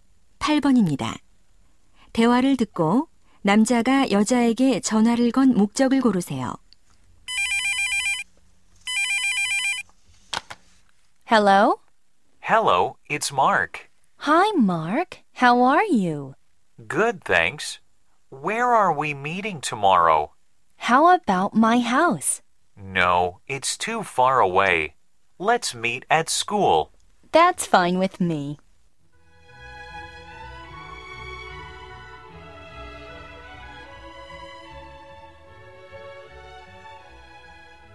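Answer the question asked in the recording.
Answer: 만날 장소를 정하려고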